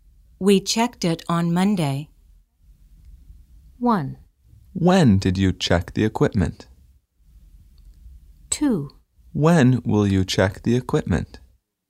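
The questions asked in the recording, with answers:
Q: We checked it on Monday.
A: 1: When did you check the equipment?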